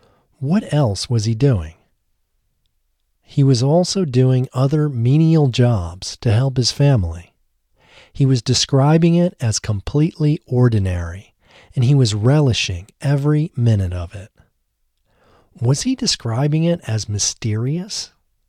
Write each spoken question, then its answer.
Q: Was he describing it as mysterious?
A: No, he wasn't describing it as mysterious.